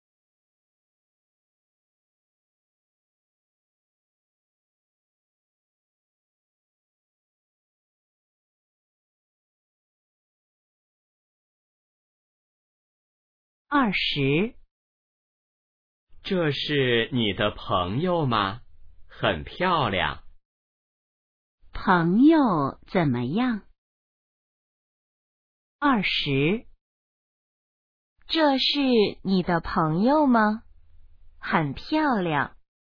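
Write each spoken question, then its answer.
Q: 朋友怎么样?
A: 很漂亮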